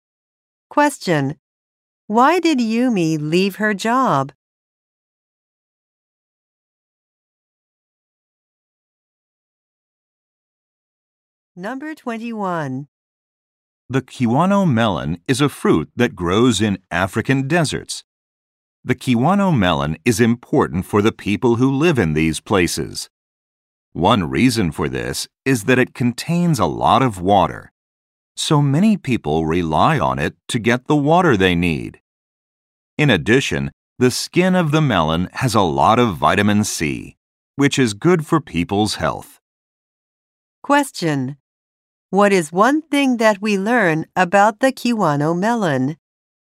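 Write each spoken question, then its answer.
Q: What is one thing that we learn about the kiwano melon?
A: It contains a lot of water.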